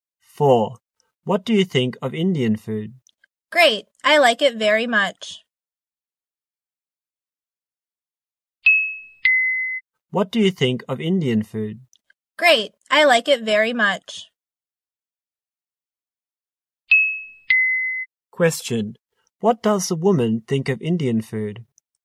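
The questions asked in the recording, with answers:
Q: Question. What does the woman think of Indian food?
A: It's great; she likes it very much.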